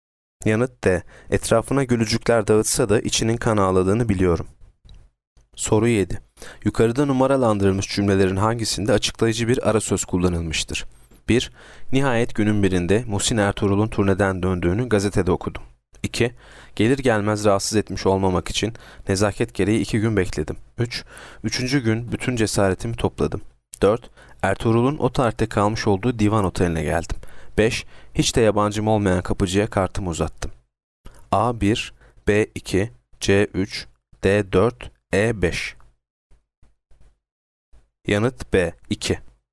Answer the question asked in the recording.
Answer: Yanıt B, 2.